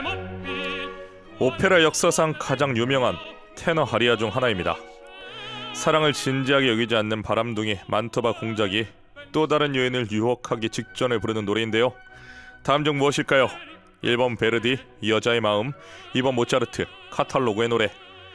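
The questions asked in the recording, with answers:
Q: 다음 중 무엇일까요? 1번 베르디, 여자의 마음, 2번 모차르트, 카탈로그의 노래.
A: 1: 베르디, 여자의 마음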